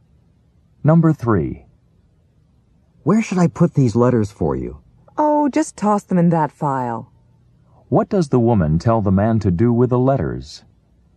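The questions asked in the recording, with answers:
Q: What does the woman tell the man to do with the letters?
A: Put them in the file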